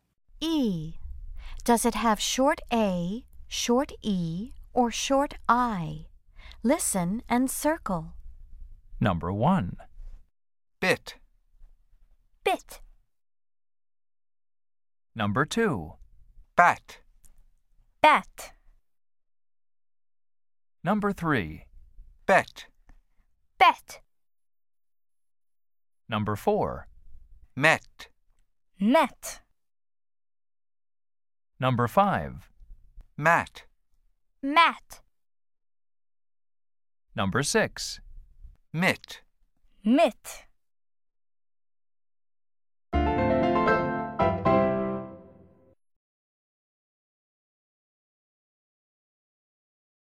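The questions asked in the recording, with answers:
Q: Does it have short A, short E, or short I?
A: short I (bit)

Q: Does it have short A, short E, or short I?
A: short A (bat)

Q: Does it have short A, short E, or short I?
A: short E (bet)

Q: Does it have short A, short E, or short I?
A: short E (met)

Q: Does it have short A, short E, or short I?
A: short A (mat)

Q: Does it have short A, short E, or short I?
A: short I (mit)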